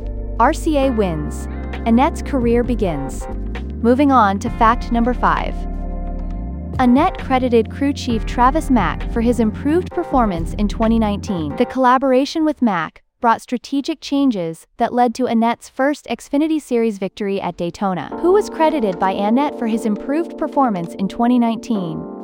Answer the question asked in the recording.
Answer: Correct answer, Travis Mack.